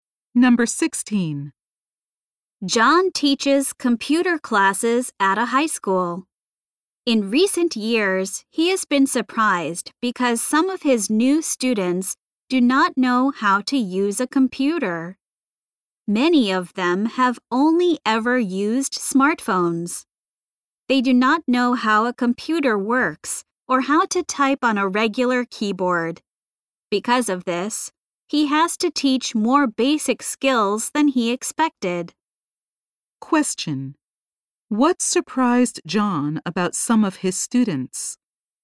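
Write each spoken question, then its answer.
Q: What surprised John about some of his students?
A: They did not know how to use a computer.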